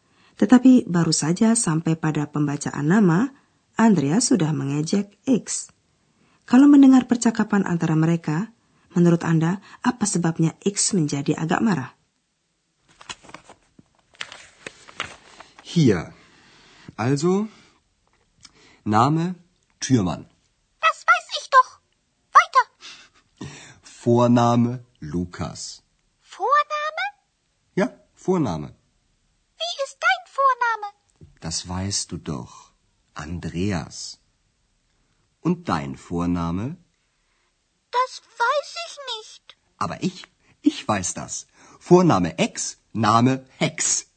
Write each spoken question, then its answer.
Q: Kalau mendengar percakapan antara mereka, menurut Anda apa sebabnya X menjadi agak marah?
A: X agak marah karena Andreas mencari nama sembarangannya, yaitu Hex, yang hampir sama artinya seperti nenek sihir atau hexe.